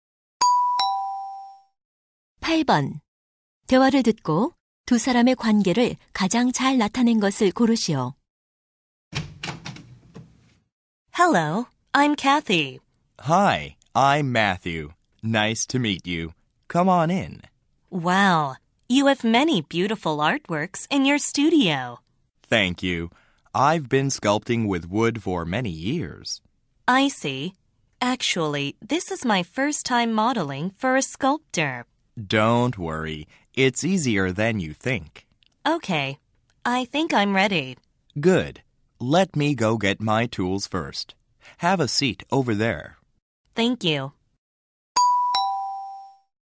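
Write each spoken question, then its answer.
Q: 대화를 듣고 두 사람의 관계를 가장 잘 나타낸 것을 고르시오.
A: 조각가와 모델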